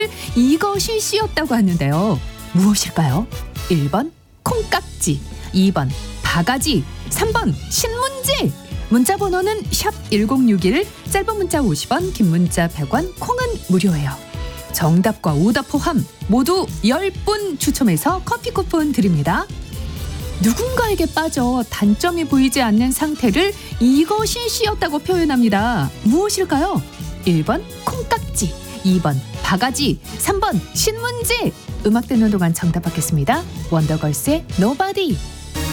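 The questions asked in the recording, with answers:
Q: 무엇일까요?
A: 1: 콩깍지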